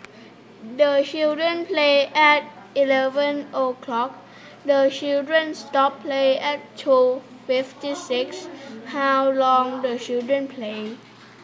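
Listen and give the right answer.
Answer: 3 hours 56 minutes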